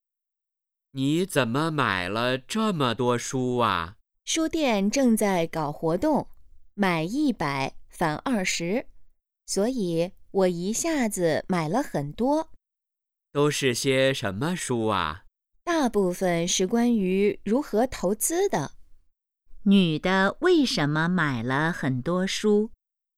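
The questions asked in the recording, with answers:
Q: 女的为什么买了很多书?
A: 书店正在搞活动,买100返20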